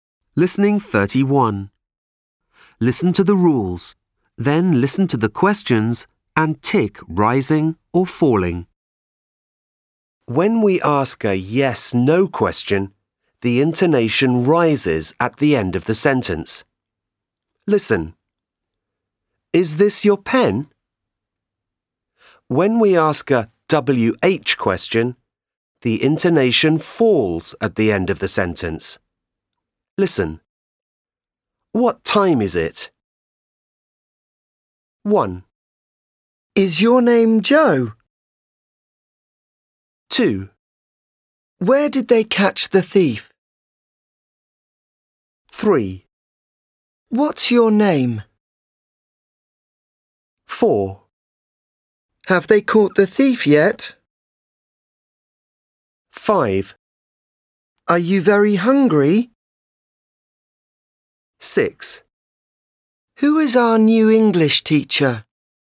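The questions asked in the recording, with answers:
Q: Is your name Joe?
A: rising

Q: Where did they catch the thief?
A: falling

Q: What's your name?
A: falling

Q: Have they caught the thief yet?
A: rising

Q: Are you very hungry?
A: rising

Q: Who is our new English teacher?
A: falling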